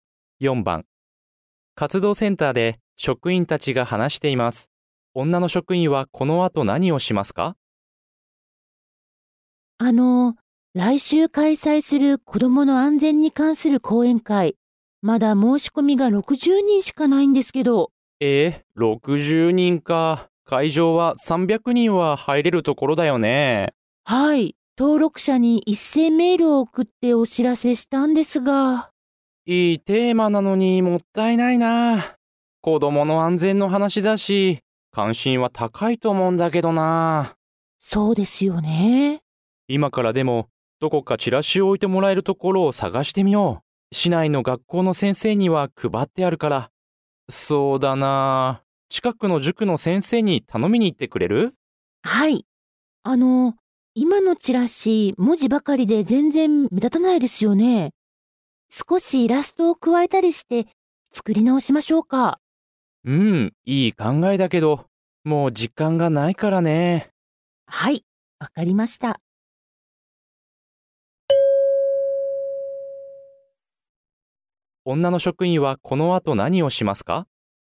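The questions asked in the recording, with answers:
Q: 女の職員はこの後何をしますか?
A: 近くの塾の先生にチラシを置いてもらうよう頼みに行く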